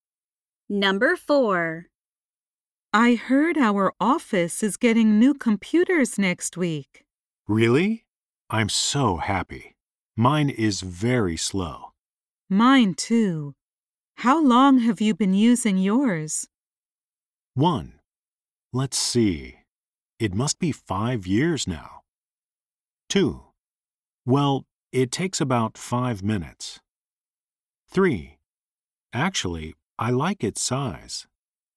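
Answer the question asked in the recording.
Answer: 1: Let's see. It must be 5 years now.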